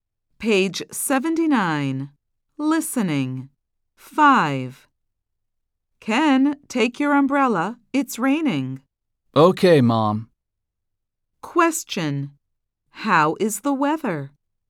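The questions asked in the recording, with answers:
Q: How is the weather?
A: It's raining.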